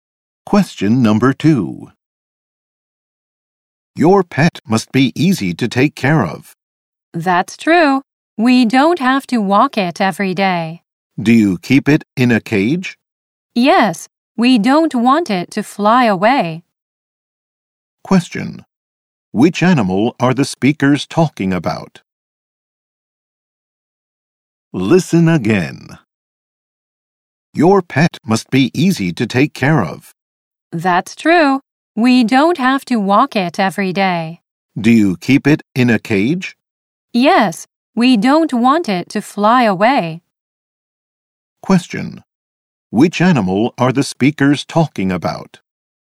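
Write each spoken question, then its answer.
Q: Which animal are the speakers talking about?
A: A bird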